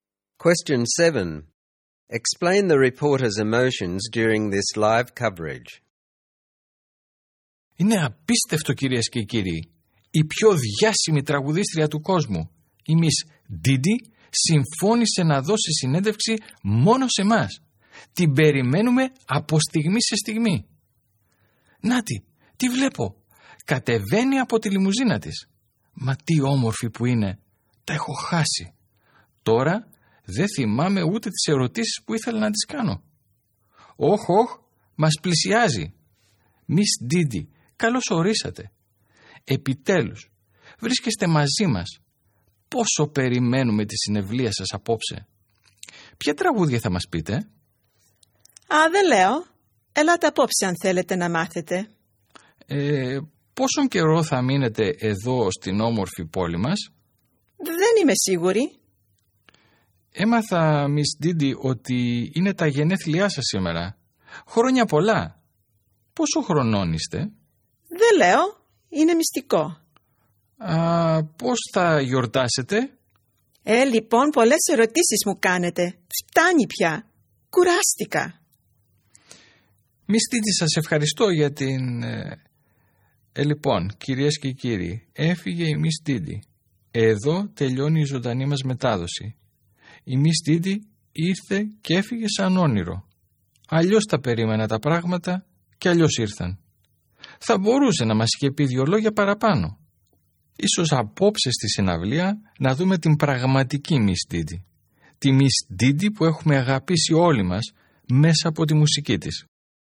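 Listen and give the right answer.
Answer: At first excited and starstruck (even forgets her questions), then disappointed because Miss Didi barely answered and left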